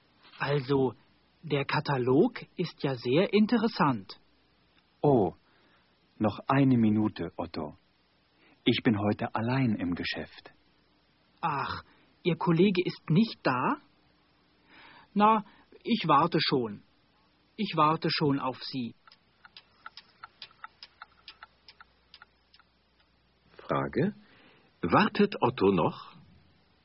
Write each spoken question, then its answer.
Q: Wartet Otto noch?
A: Ja, er wartet noch.